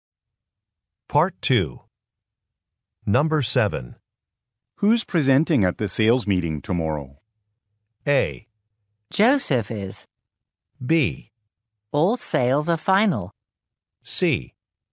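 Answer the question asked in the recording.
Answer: A: Joseph is.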